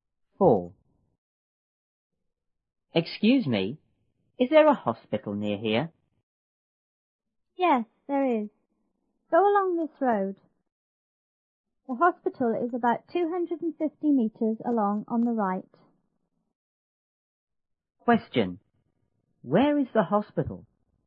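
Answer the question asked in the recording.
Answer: About 250 meters along this road on the right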